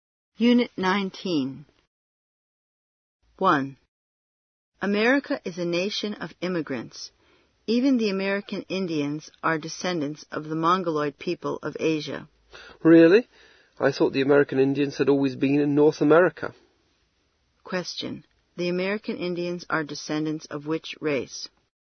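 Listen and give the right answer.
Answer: The Mongoloid people of Asia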